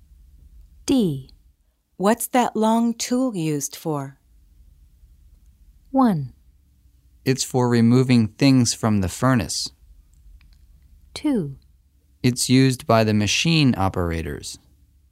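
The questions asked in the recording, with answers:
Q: What's that long tool used for?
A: 1: It's for removing things from the furnace.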